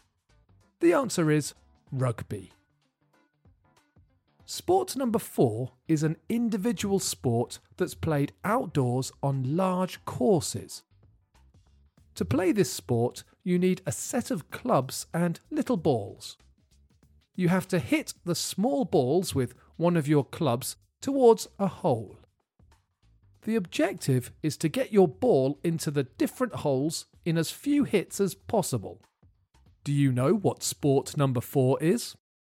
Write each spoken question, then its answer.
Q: Do you know what sport number four is?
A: The answer is golf.